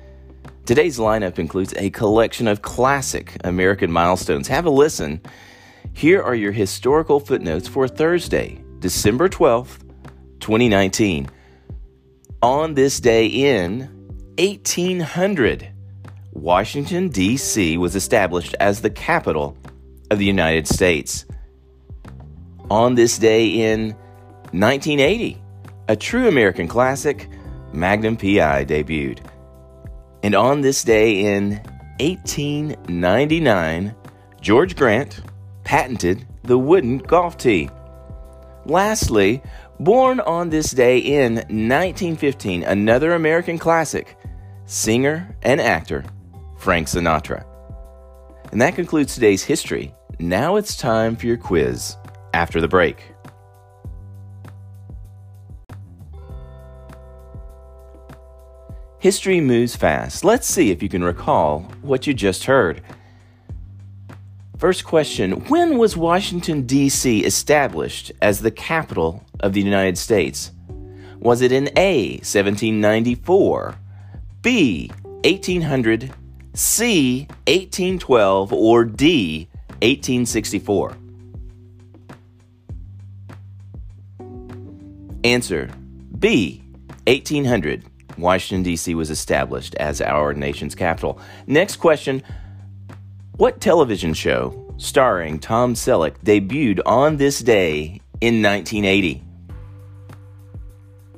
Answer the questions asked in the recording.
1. Answer, B, 1800, Washington, D.C.
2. Answer, Magnum P.I.